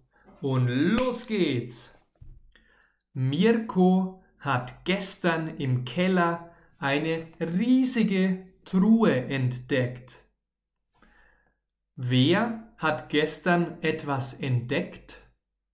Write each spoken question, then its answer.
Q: Wer hat gestern etwas entdeckt?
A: Mirko, unser Freund Mirko.